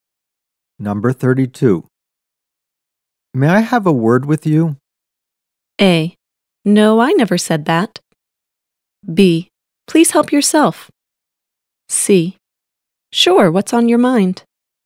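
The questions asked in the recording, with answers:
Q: May I have a word with you?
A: C: Sure, what's on your mind?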